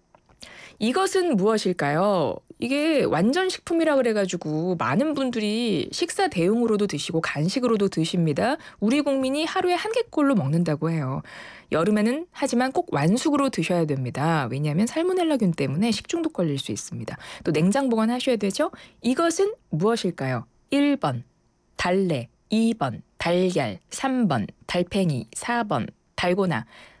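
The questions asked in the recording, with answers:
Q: 이것은 무엇일까요?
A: 2: 달걀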